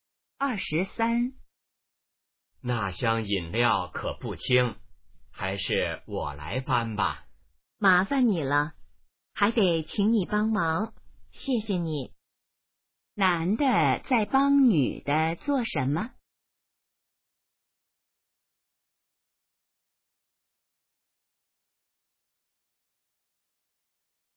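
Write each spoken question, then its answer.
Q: 男的在帮女的做什么?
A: 搬饮料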